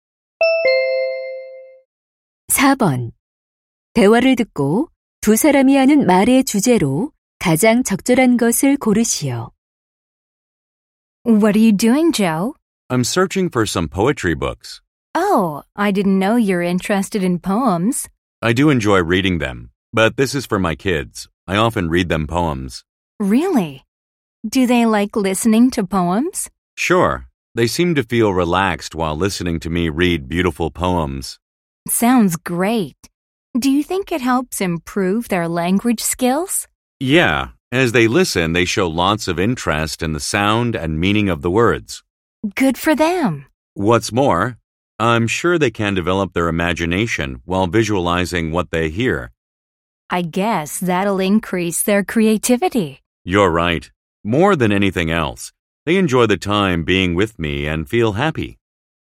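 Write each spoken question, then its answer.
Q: 대화를 듣고 두 사람이 하는 말의 주제로 가장 적절한 것을 고르시오.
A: 아이들에게 시를 읽어 주는 것의 좋은 점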